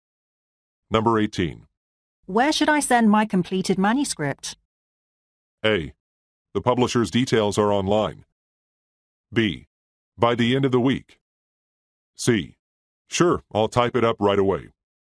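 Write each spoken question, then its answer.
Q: Where should I send my completed manuscript?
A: A: The publisher's details are online.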